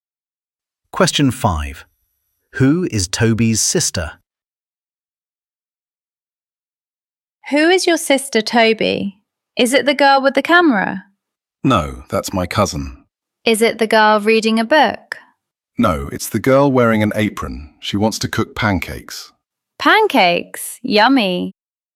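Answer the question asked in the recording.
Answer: The girl wearing an apron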